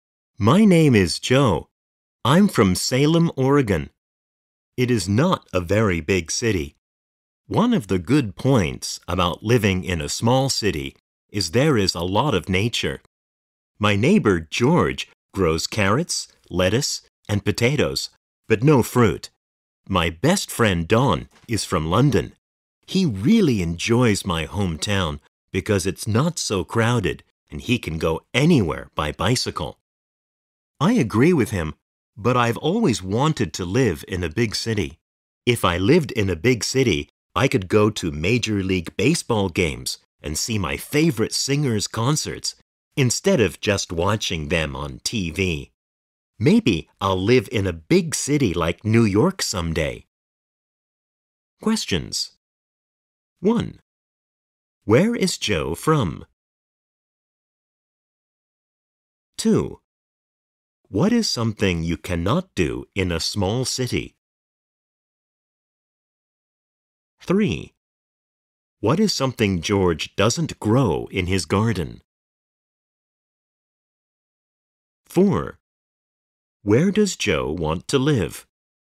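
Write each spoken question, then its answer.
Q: Where is Joe from?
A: Salem, Oregon

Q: What is something George doesn't grow in his garden?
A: Fruit

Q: Where does Joe want to live?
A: In a big city like New York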